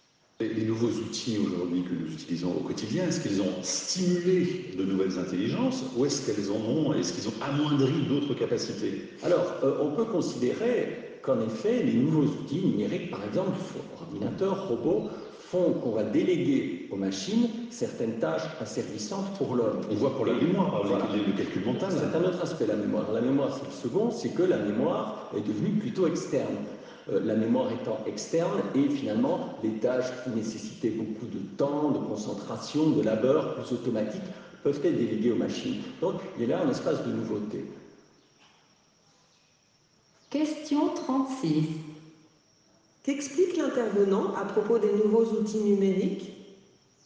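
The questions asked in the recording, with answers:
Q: Qu'explique l'intervenant à propos des nouveaux outils numériques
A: Ils permettent de déléguer aux machines des tâches asservissantes ou laborieuses pour l'homme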